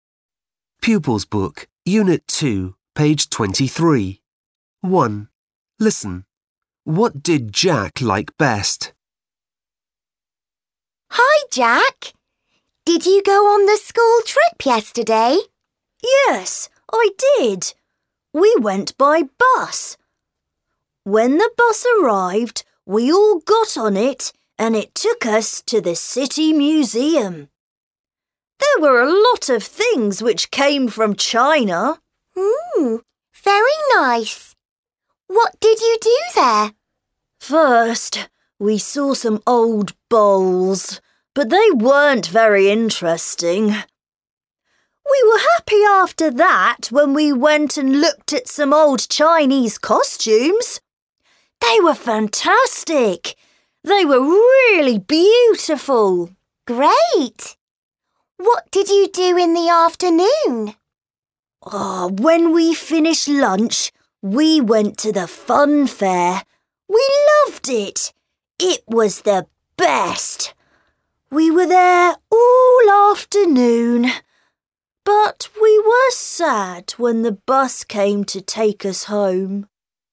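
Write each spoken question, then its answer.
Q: What did Jack like best?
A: the fun fair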